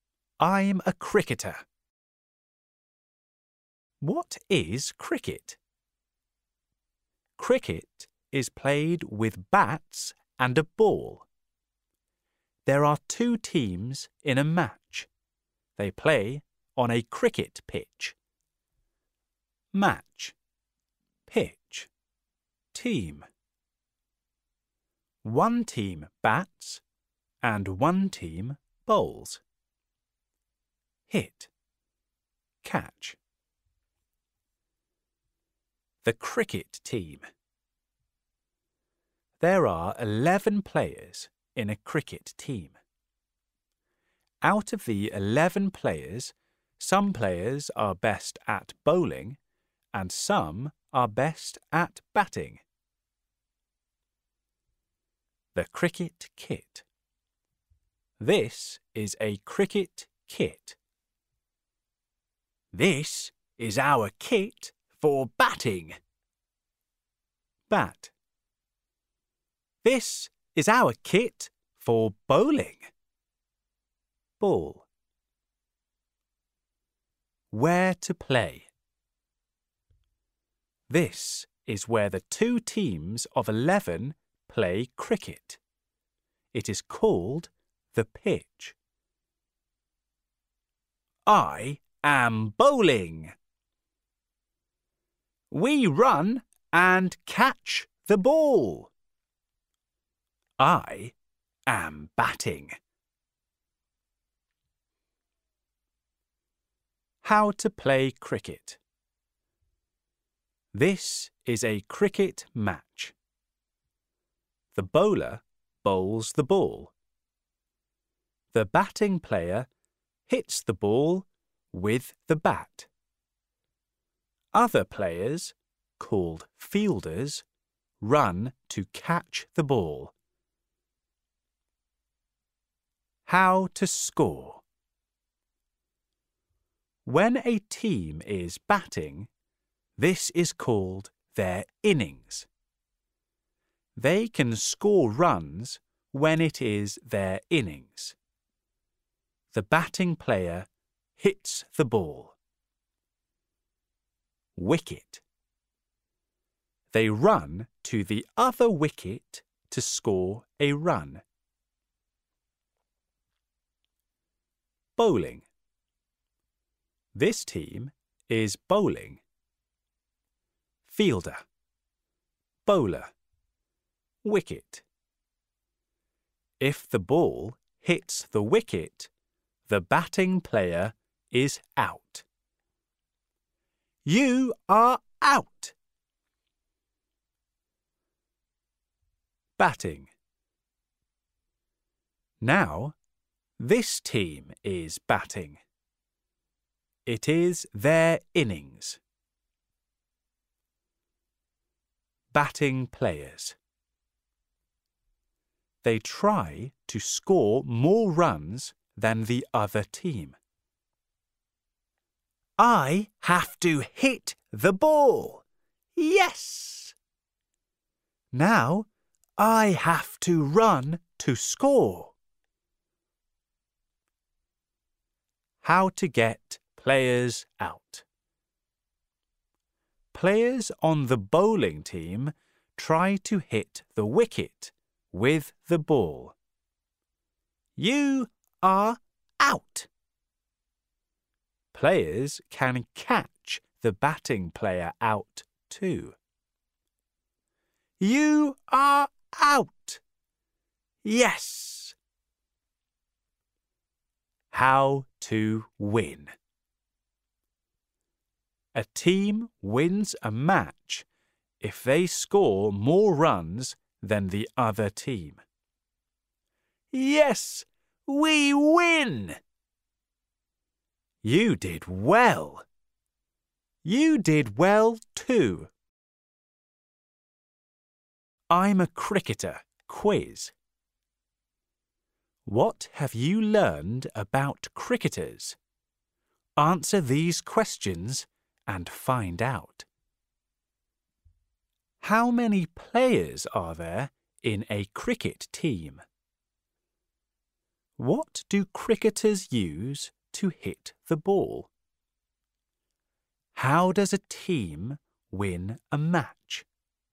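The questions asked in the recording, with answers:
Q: How many players are there in a cricket team?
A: 11

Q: What do cricketers use to hit the ball?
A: a bat

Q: How does a team win a match?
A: by scoring more runs than the other team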